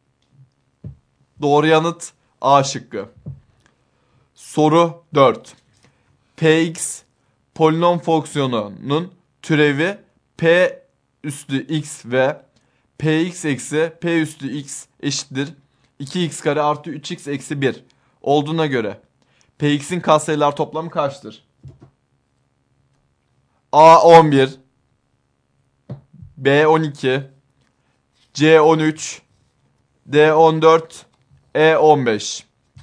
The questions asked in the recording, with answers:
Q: Px polinom fonksiyonunun türevi p üstü x ve px eksi p üstü x eşittir 2x kare artı 3x eksi 1 olduğuna göre px'in katsayılar toplamı kaçtır?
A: Doğru yanıt E şıkkı.